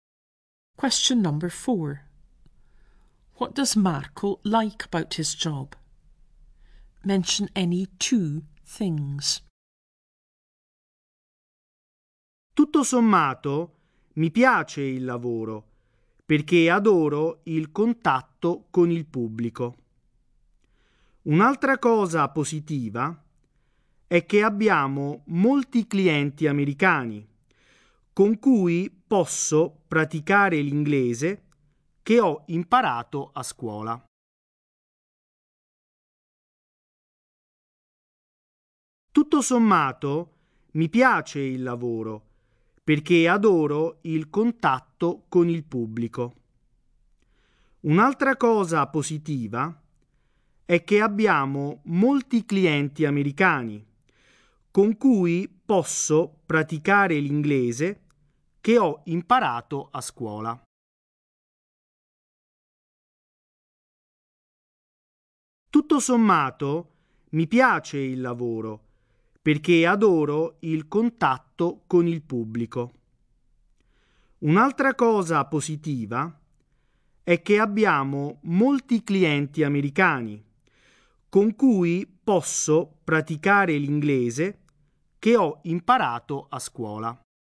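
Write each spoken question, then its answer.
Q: What does Marco like about his job?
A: Contact with the public; practising English with American customers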